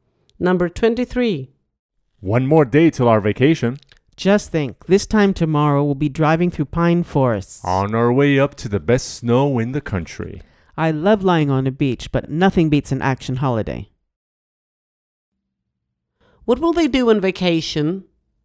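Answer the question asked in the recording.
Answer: Go skiing in the snow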